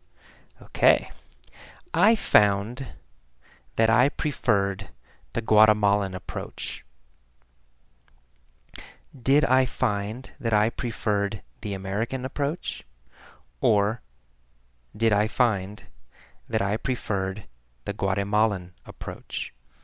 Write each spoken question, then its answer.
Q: Or did I find that I preferred the Guatemalan approach?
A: Well, the Guatemalan approach.